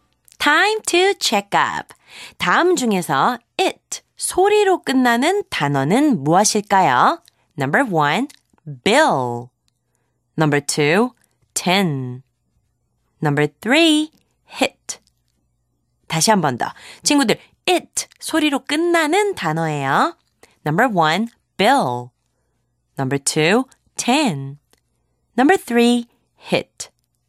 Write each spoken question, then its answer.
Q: 다음 중에서 it 소리로 끝나는 단어는 무엇일까요?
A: 정답은 number three, hit.